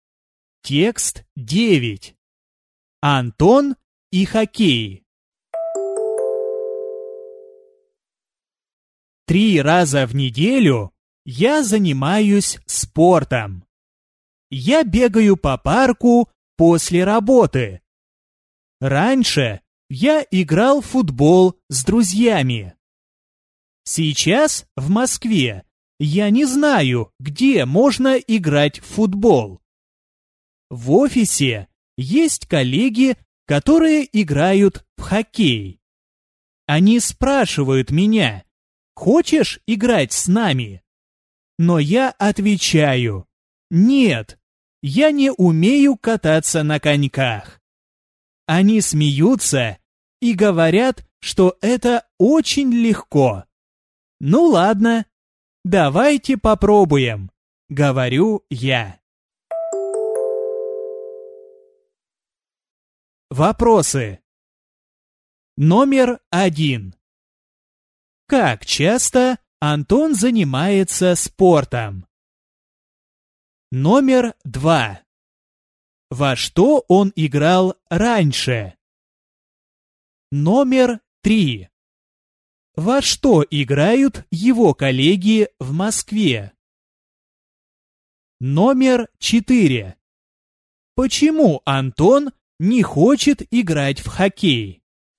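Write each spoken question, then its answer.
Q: Как часто Антон занимается спортом?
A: Три раза в неделю

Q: Во что он играл раньше?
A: В футбол

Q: Во что играют его коллеги в Москве?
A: В хоккей

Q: Почему Антон не хочет играть в хоккей?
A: Он не умеет кататься на коньках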